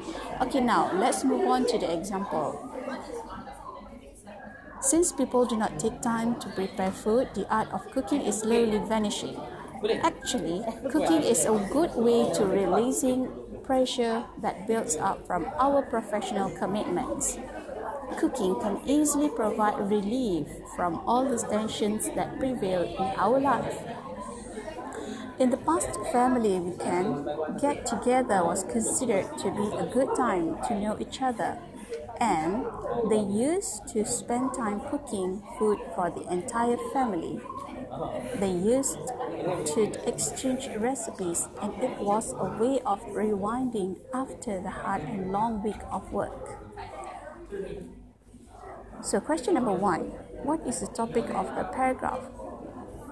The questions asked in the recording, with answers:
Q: So question number 1, what is the topic of the paragraph?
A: Yes, the topic is cooking.